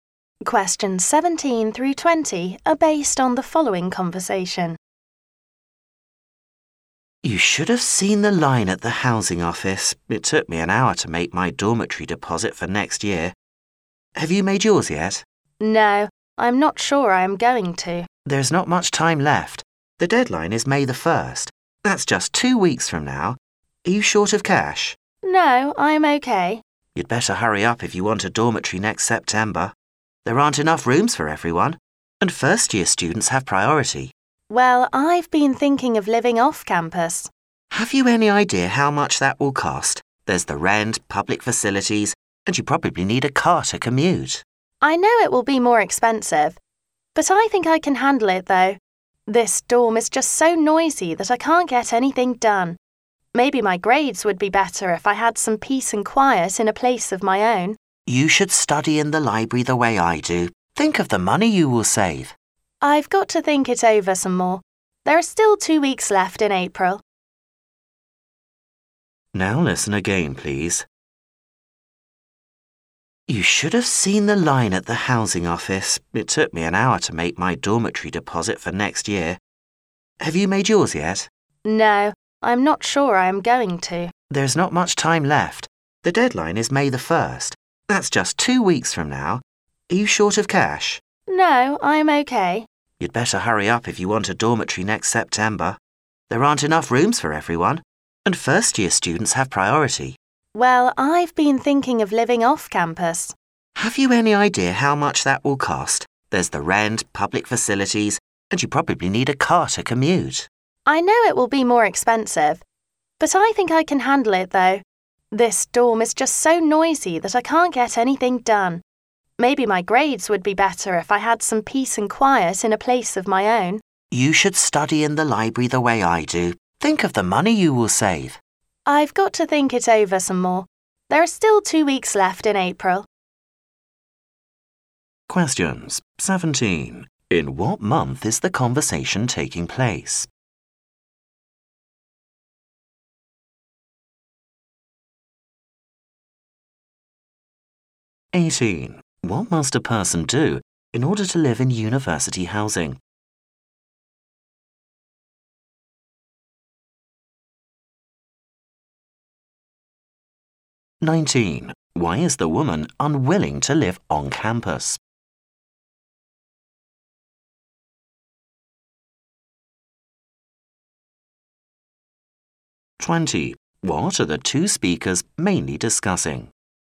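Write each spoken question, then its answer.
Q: In what month is the conversation taking place?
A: April

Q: What must a person do in order to live in university housing?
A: Pay a dormitory deposit by May 1st

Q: Why is the woman unwilling to live on campus?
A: The dorm is too noisy

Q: What are the two speakers mainly discussing?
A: Whether to live in a dorm or off campus next year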